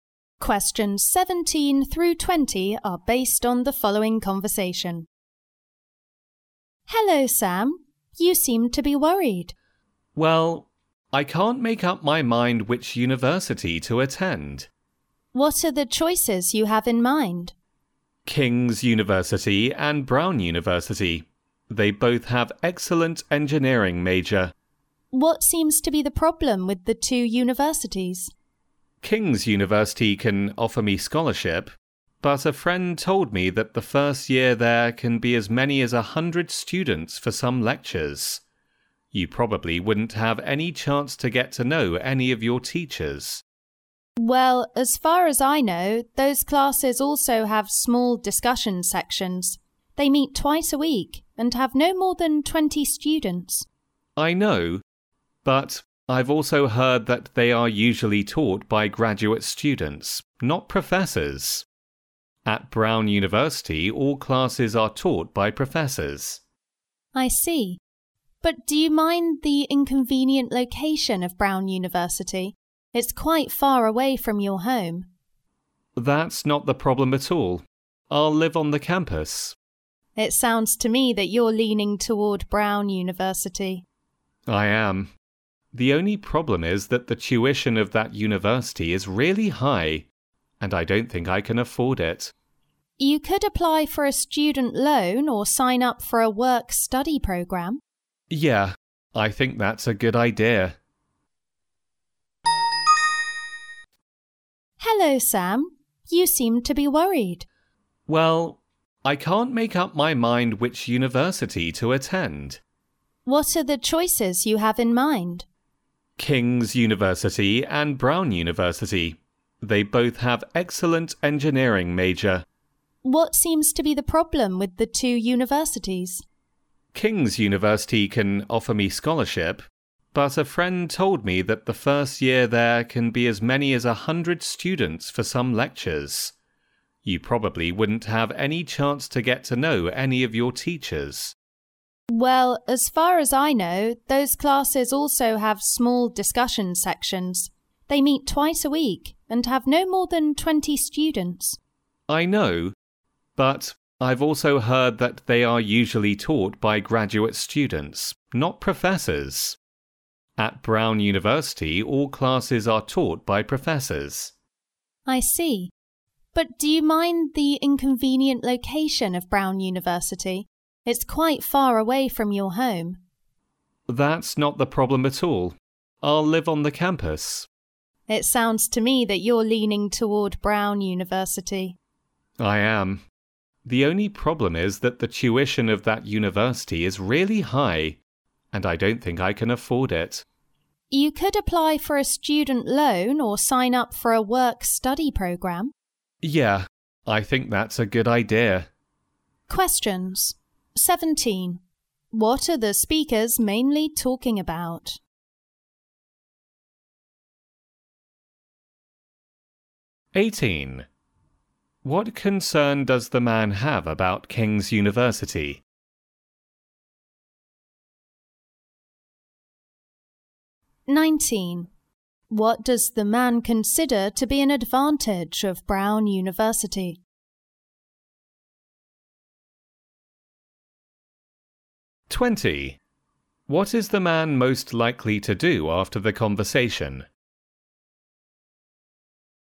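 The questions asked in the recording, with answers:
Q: What are the speakers mainly talking about?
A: Which university the man should attend

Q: What concern does the man have about King's University?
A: Big classes and classes taught by graduate students, not professors

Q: What does the man consider to be an advantage of Brown University?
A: All classes are taught by professors

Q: What is the man most likely to do after the conversation?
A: Apply for a student loan or a work-study programme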